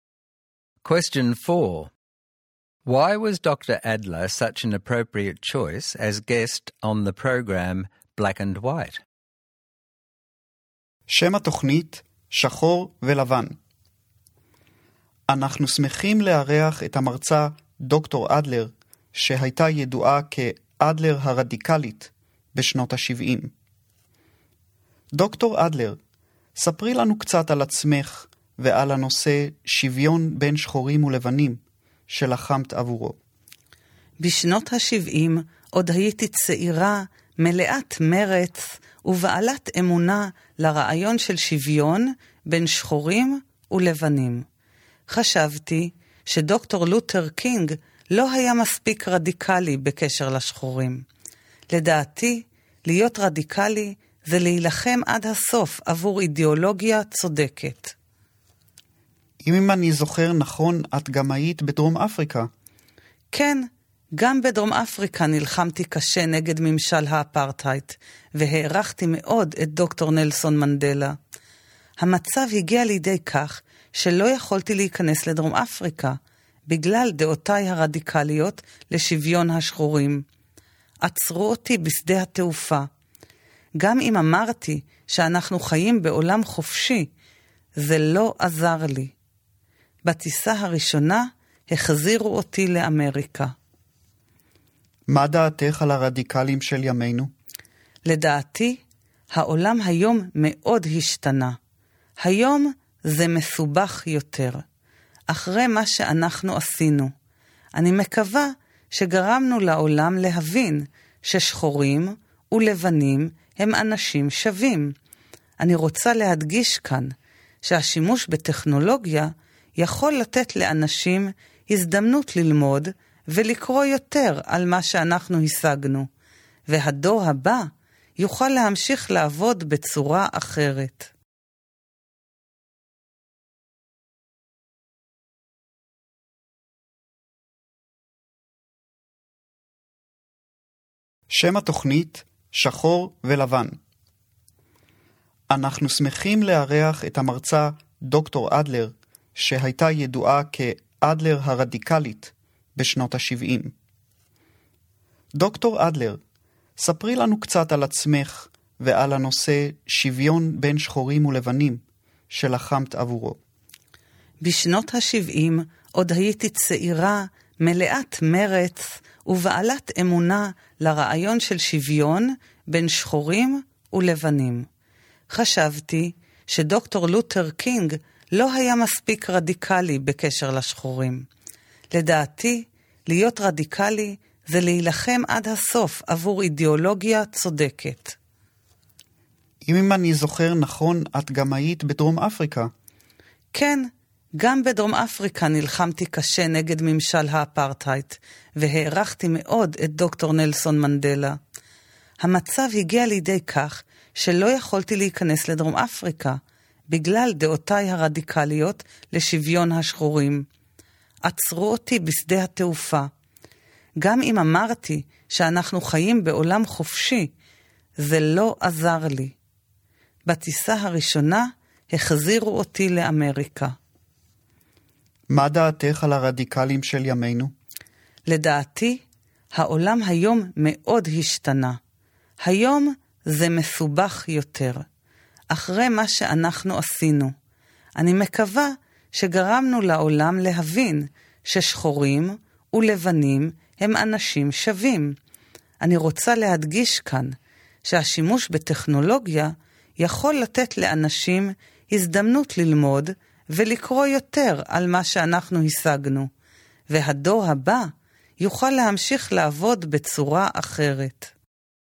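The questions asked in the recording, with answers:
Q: Why was Dr. Adler such an appropriate choice as guest on the program Black and White?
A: She was a radical activist who fought for equality between black and white people, in the USA and against apartheid in South Africa, and was even barred from entering South Africa.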